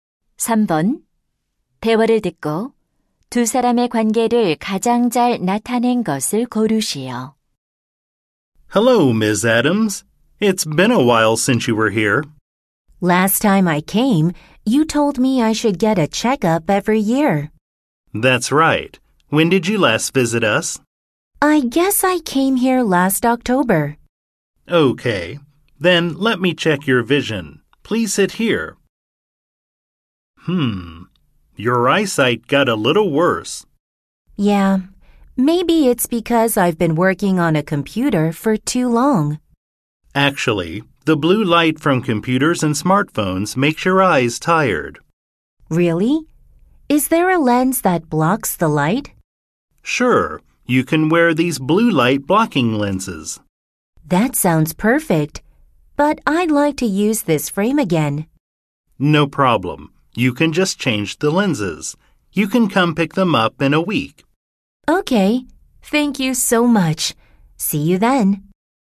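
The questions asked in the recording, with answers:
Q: 대화를 듣고 두 사람의 관계를 가장 잘 나타낸 것을 고르시오.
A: 안경사 - 손님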